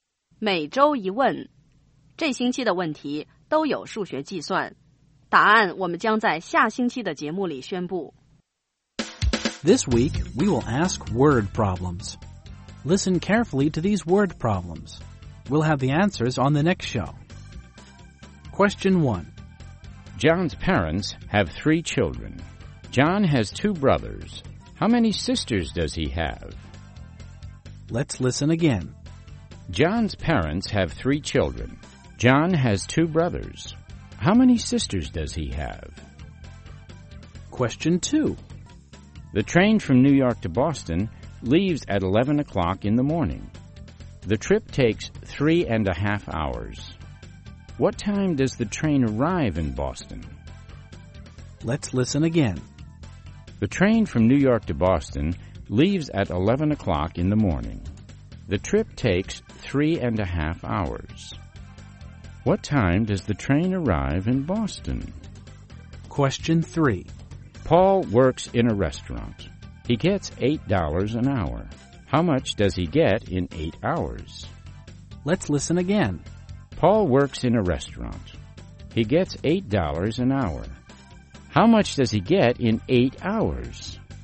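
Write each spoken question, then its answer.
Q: John's parents have 3 children. John has 2 brothers. How many sisters does he have?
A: None (0 sisters)

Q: What time does the train arrive in Boston?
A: 2:30 in the afternoon

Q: How much does he get in 8 hours?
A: $64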